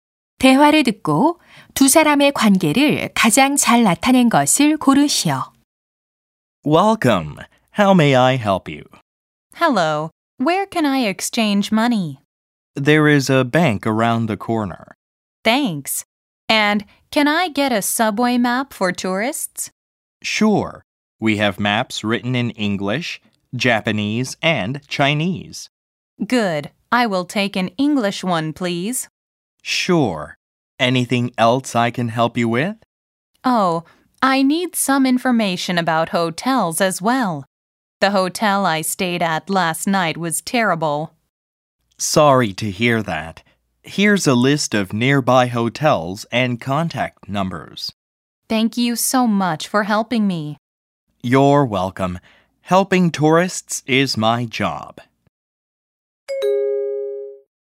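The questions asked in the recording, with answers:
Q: 대화를 듣고 두 사람의 관계를 가장 잘 나타낸 것을 고르시오.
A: 관광 안내소 직원 - 관광객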